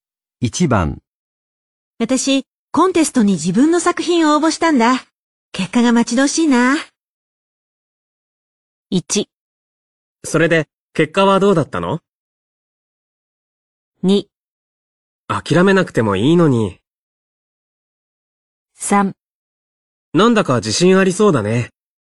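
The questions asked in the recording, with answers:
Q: 私、コンテストに自分の作品を応募したんだ。結果が待ち遠しいな。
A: 3: なんだか自信ありそうだね。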